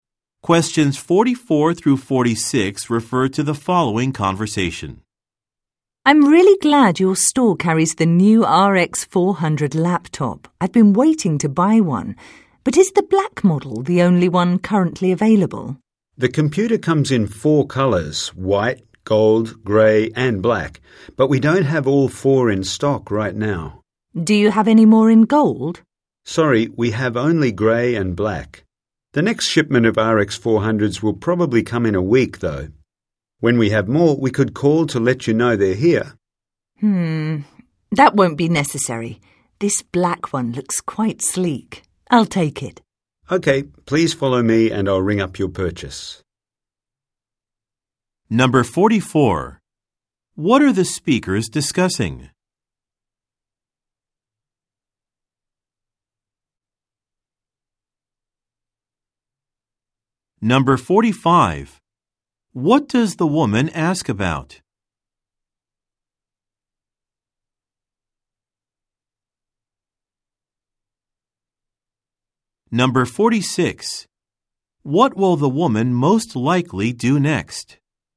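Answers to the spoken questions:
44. A laptop computer (the RX 400)
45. Whether the laptop is available in other colours, such as gold
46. Buy the black laptop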